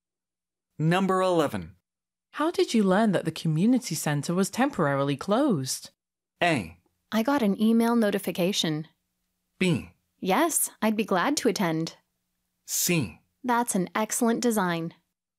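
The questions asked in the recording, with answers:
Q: How did you learn that the community centre was temporarily closed?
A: A: I got an email notification.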